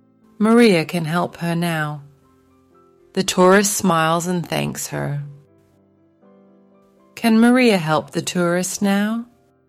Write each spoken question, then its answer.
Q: Can Maria help the tourist now?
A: Yes, she can.